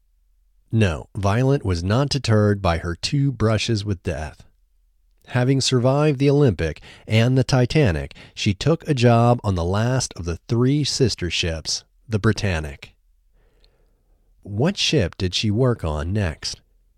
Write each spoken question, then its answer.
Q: What ship did she work on next?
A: She next worked on the Britannic.